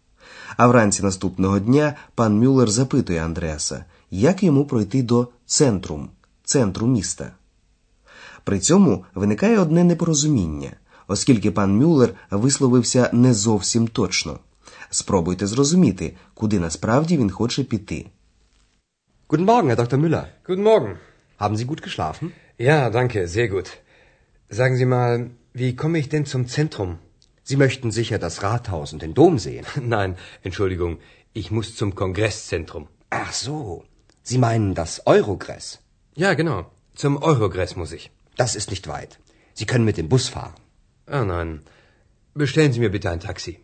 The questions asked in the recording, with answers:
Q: Спробуйте зрозуміти, куди насправді він хоче піти.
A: Пан Мюллер хоче йти не до центру міста, а до конгрес-центру, який в Ахені ще називають Ойрогрес.